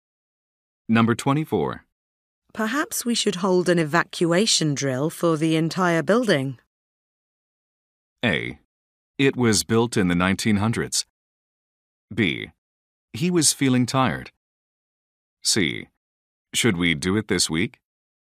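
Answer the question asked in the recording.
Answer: C: Should we do it this week?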